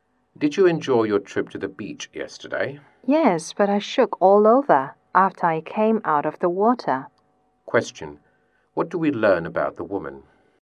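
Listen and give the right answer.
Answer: She felt very cold after coming out of the water.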